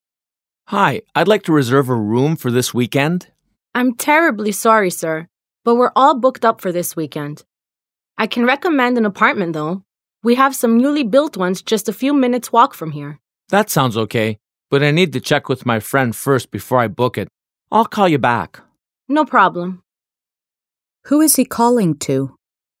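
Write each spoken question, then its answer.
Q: Who is he calling to?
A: A hotel receptionist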